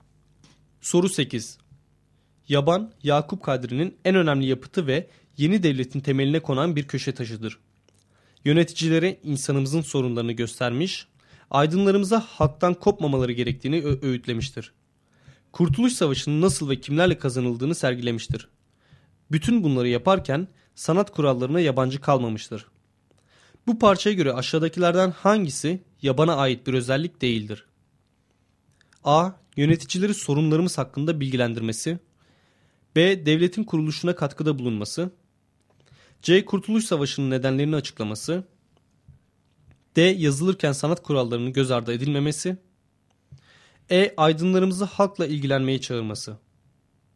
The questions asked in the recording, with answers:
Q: Bu parçaya göre aşağıdakilerden hangisi yabana ait bir özellik değildir?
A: Doğru cevap C şıkkı.